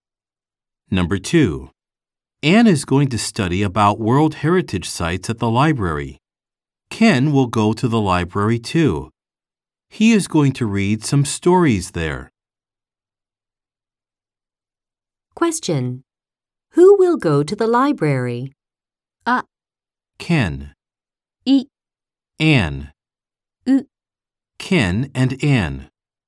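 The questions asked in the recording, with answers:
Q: Who will go to the library?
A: U: Ken and Ann.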